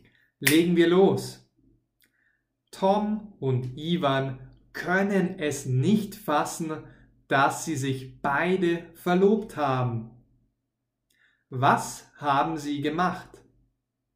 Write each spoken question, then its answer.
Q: Was haben sie gemacht?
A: Sie haben sich verlobt.